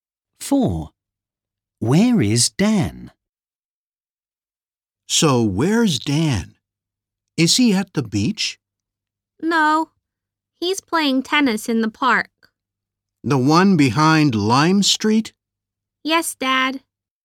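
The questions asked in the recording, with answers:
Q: Where is Dan?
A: playing tennis in the park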